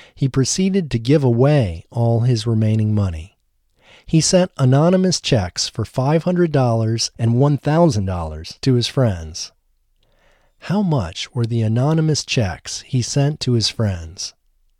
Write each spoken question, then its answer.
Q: How much were the anonymous checks he sent to his friends?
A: The anonymous checks he sent to his friends were $500 and $1,000.